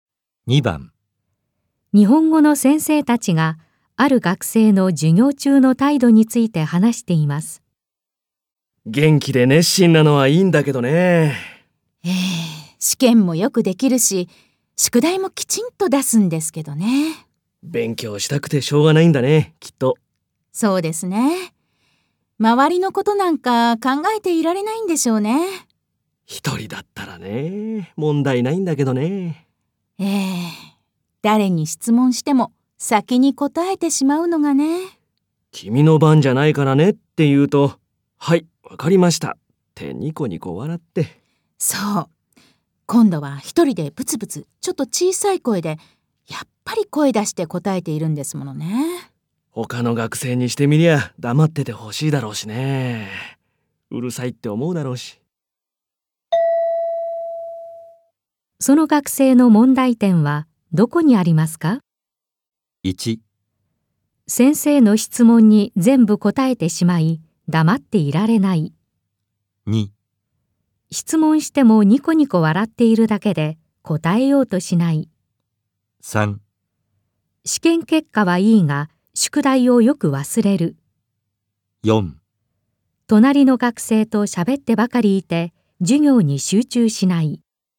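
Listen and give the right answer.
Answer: 1: 先生の質問に全部答えてしまい、黙っていられない。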